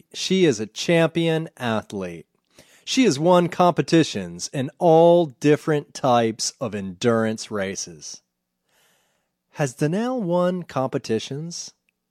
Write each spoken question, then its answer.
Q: Has Danielle won competitions?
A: Yes, she has won competitions.